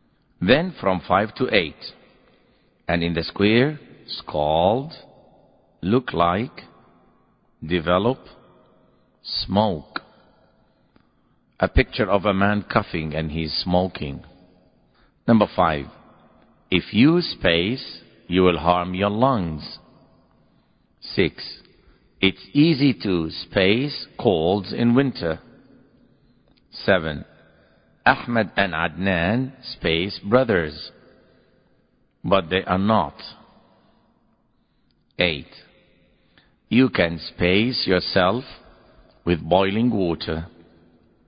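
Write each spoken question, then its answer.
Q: If you space, you will harm your lungs.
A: smoke

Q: It's easy to space colds in winter.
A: develop

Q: Ahmed and Adnan space brothers. But they are not.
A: look like

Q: You can space yourself with boiling water.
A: scald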